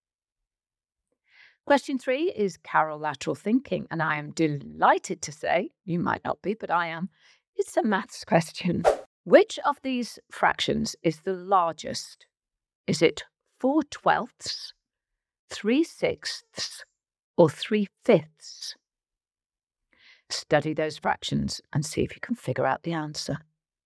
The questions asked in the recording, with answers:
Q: Which of these fractions is the largest?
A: And the answer is 3/5.